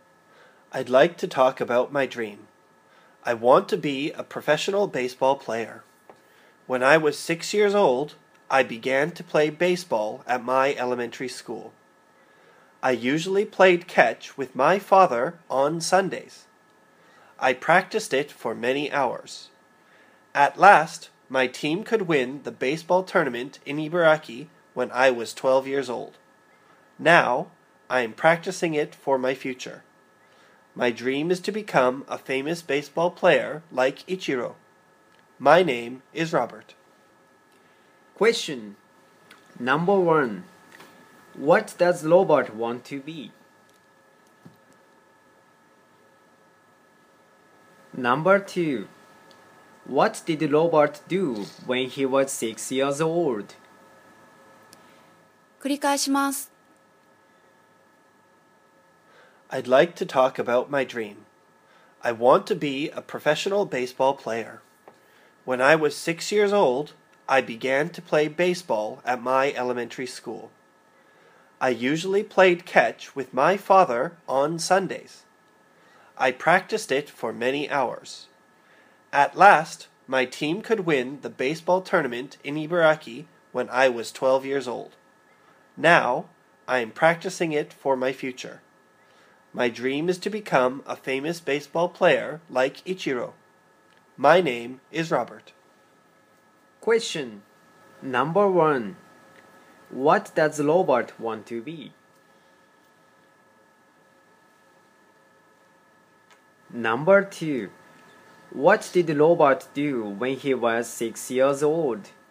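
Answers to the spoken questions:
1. A professional baseball player
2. He began to play baseball at his elementary school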